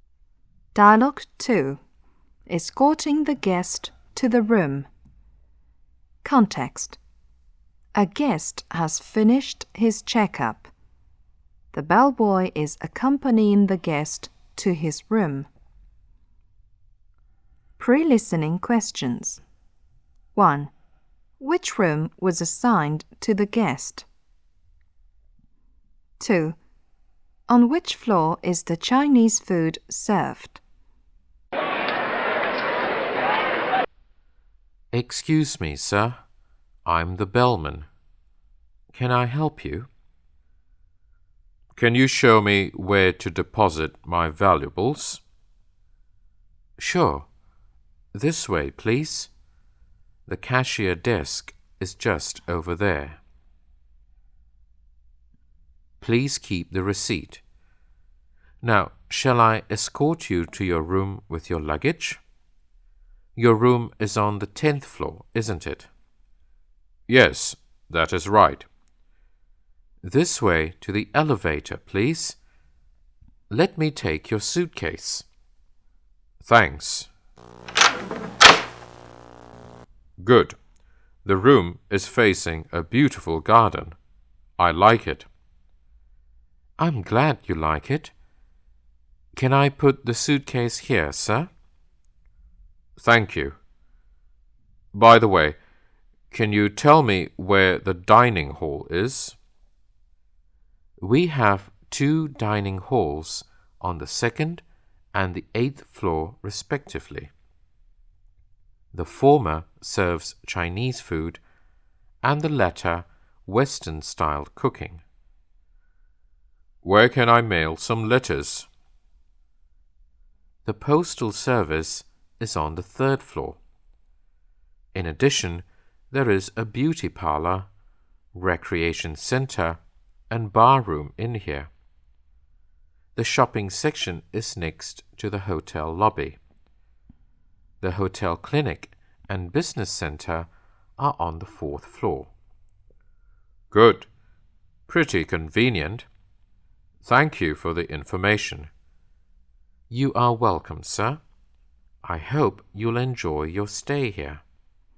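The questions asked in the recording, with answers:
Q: On which floor is the Chinese food served?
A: The second floor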